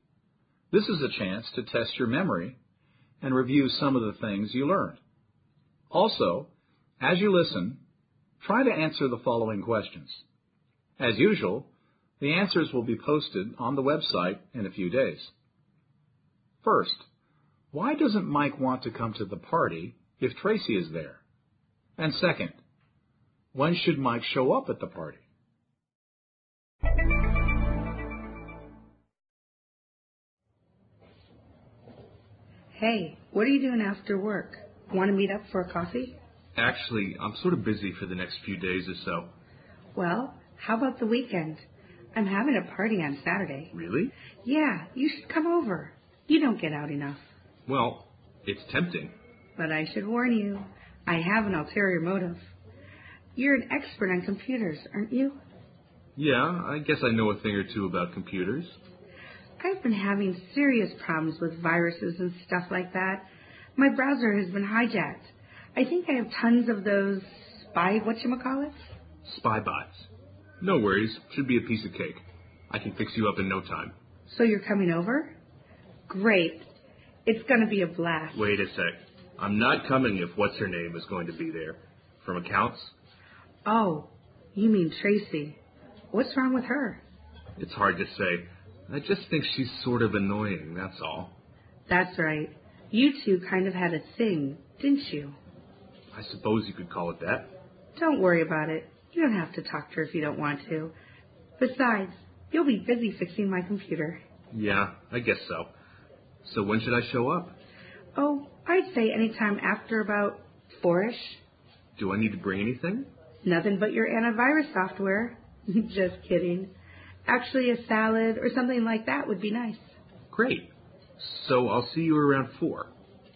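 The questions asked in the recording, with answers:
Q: First, why doesn't Mike want to come to the party if Tracy is there?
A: He finds her annoying; they had a past relationship (a thing)

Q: And second, when should Mike show up at the party?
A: Anytime after about 4-ish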